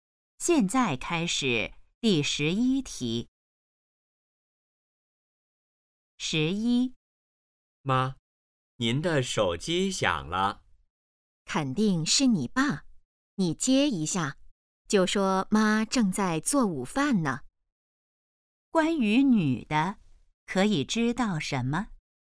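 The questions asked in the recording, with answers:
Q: 关于女的,可以知道什么?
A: 她正在做午饭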